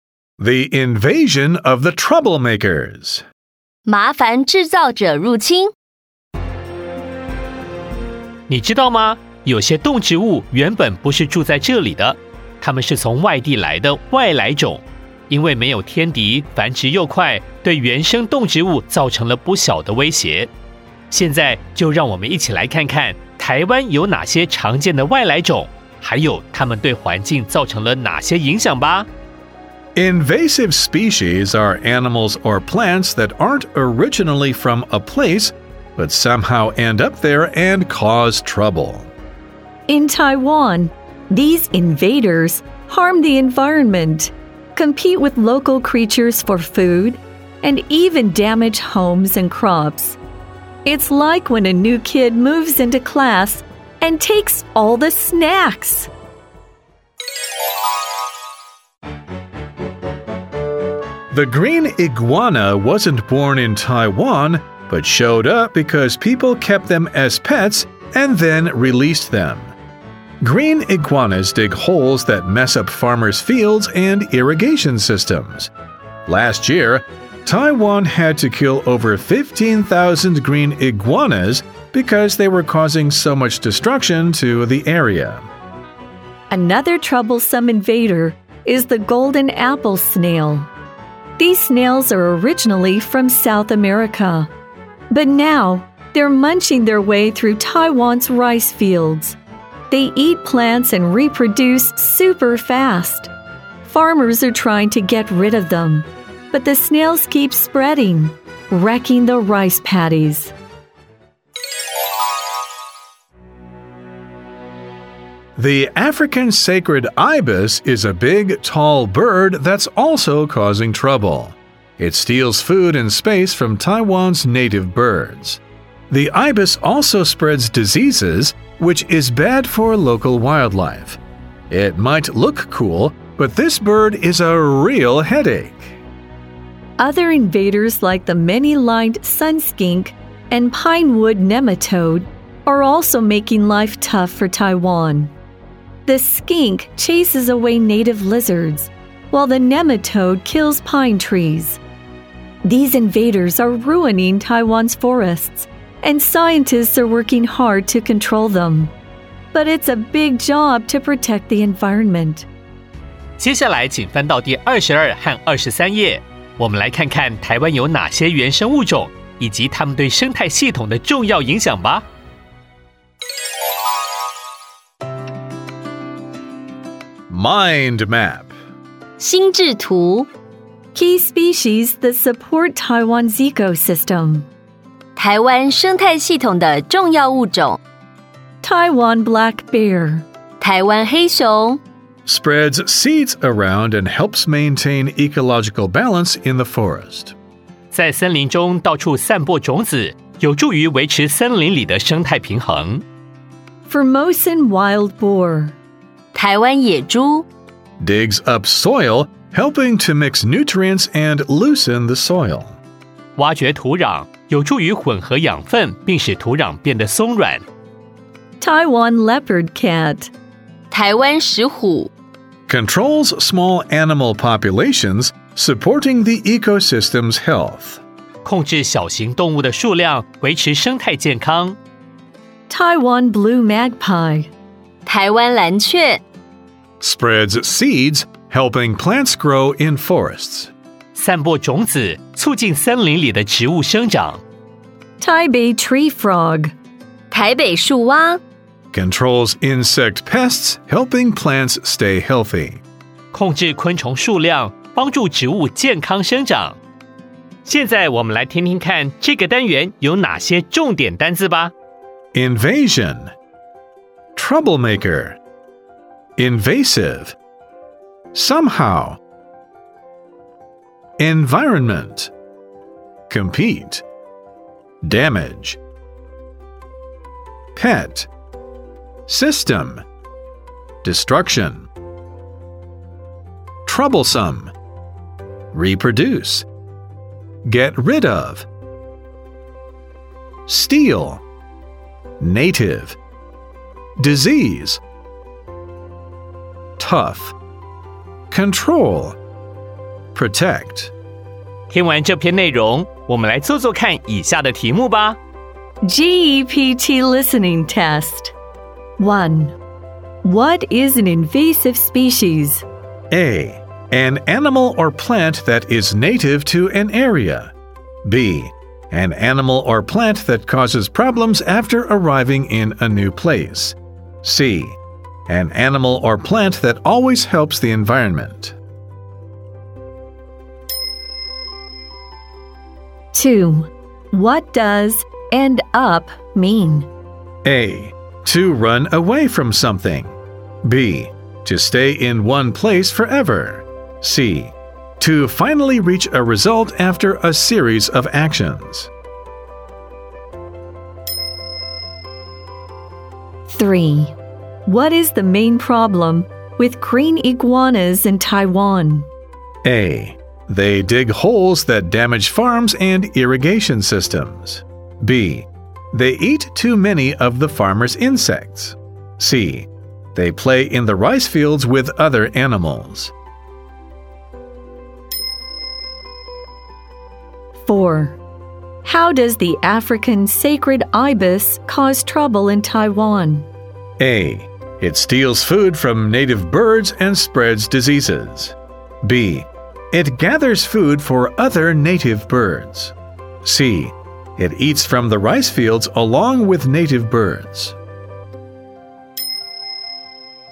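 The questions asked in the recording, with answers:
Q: What is an invasive species?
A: B: An animal or plant that causes problems after arriving in a new place.

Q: What does end up mean?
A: C: To finally reach a result after a series of actions.

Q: What is the main problem with green iguanas in Taiwan?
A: A: They dig holes that damage farms and irrigation systems.

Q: How does the African sacred ibis cause trouble in Taiwan?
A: A: It steals food from native birds and spreads diseases.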